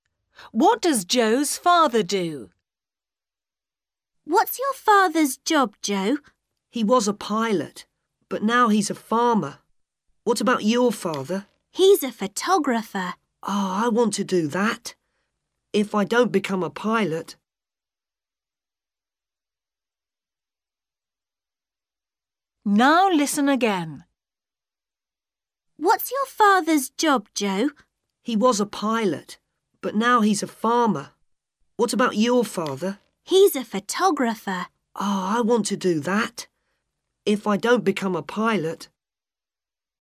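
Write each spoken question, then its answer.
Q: What does Joe's father do?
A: He's a farmer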